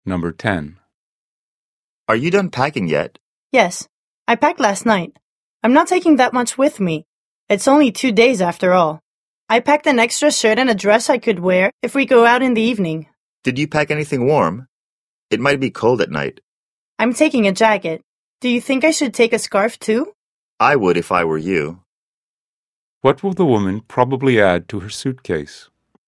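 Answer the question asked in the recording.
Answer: A scarf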